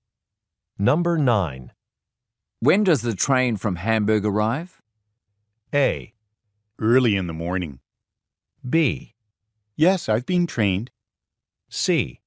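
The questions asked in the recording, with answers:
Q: When does the train from Hamburg arrive?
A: A: Early in the morning.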